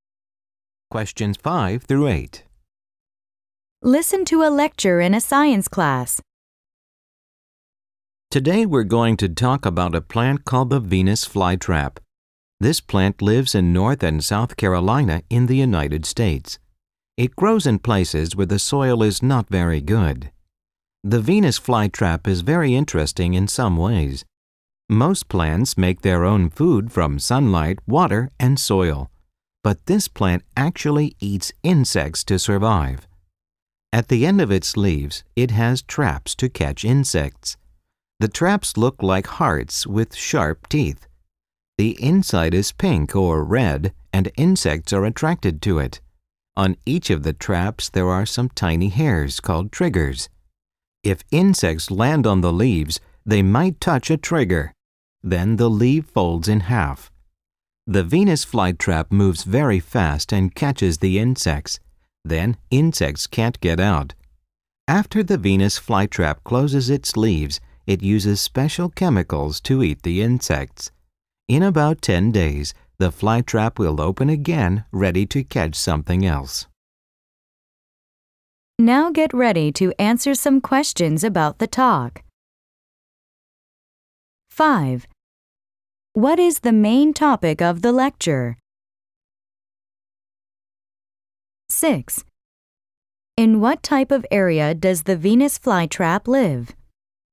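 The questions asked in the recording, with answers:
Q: What is the main topic of the lecture?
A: The Venus flytrap

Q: In what type of area does the Venus flytrap live?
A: Places where the soil is not very good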